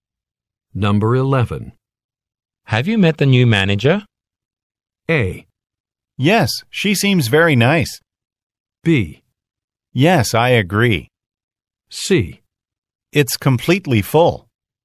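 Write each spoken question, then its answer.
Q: Have you met the new manager?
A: A: Yes, she seems very nice.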